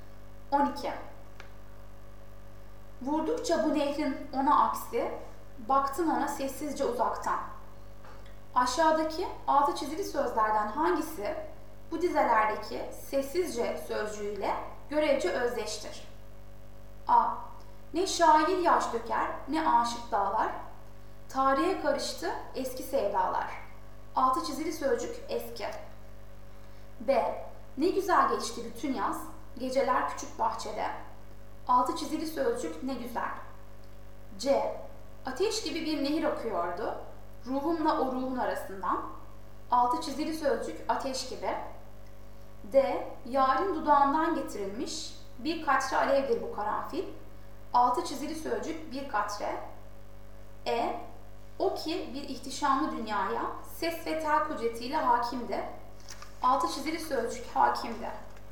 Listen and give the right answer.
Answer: Doğru yanıt B.